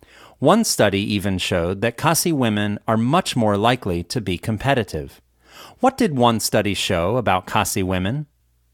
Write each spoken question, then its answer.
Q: What did one study show about Khasi women?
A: One study showed that Khasi women are much more likely to be competitive.